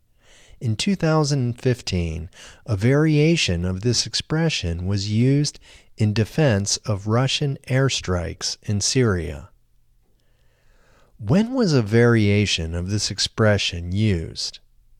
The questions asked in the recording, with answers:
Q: When was a variation of this expression used?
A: In 2015, a variation of this expression was used.